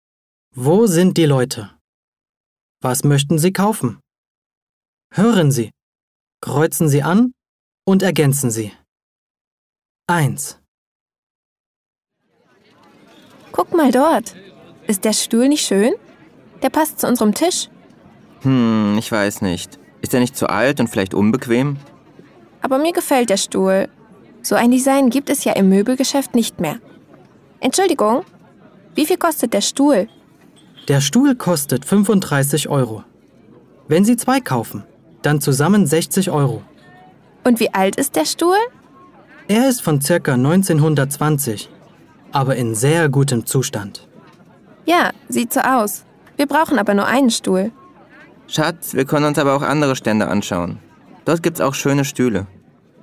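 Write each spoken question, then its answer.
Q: Was möchten Sie kaufen?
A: Einen Stuhl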